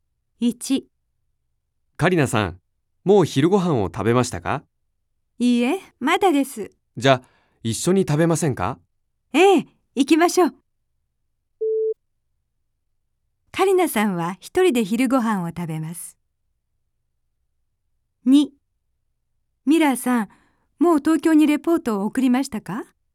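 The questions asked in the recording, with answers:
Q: カリナさんは一人で昼ご飯を食べます。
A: ×(一緒に食べます)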